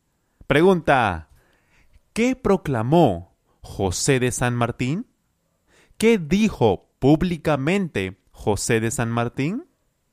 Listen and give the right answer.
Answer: Él proclamó su célebre discurso de la independencia del Perú.